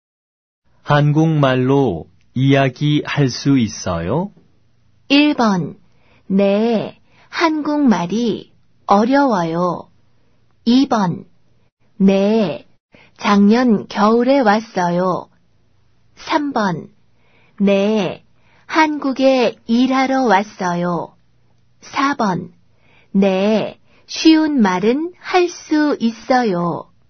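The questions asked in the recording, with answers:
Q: 한국말로 이야기할 수 있어요?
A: 4: 네, 쉬운 말은 할 수 있어요.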